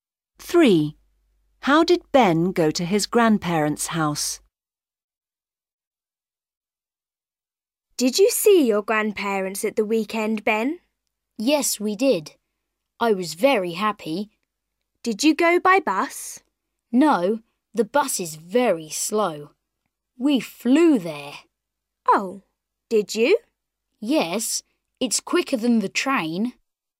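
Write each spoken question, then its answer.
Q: How did Ben go to his grandparents' house?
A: by plane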